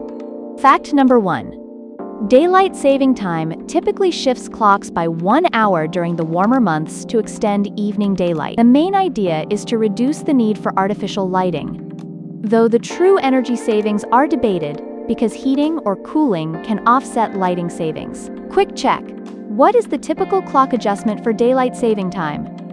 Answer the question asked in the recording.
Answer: Correct answer, 1 hour.